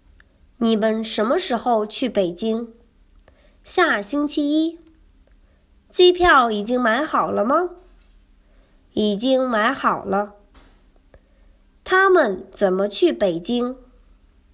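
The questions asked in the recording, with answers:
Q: 他们怎么去北京?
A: 坐飞机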